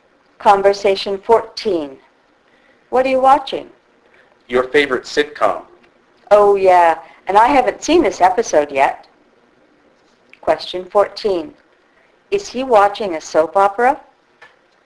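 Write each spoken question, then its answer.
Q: Is he watching a soap opera?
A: No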